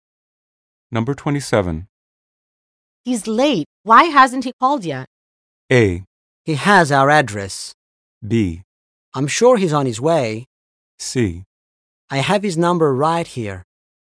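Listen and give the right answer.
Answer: B: I'm sure he's on his way.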